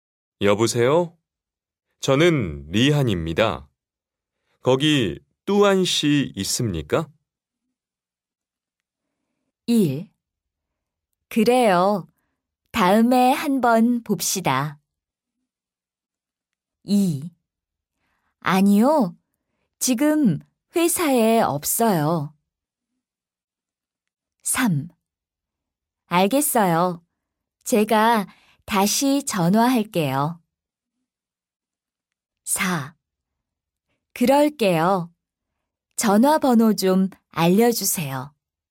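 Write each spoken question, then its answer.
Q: 여보세요? 저는 리한입니다. 거기 뚜안 씨 있습니까?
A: 2: 아니요. 지금 회사에 없어요.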